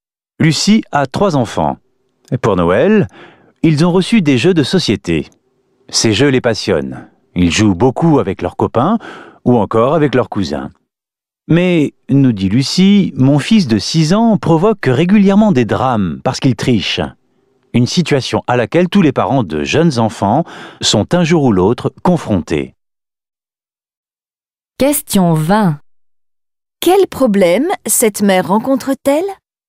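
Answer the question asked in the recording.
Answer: Son fils de 6 ans triche aux jeux de société, ce qui provoque des drames.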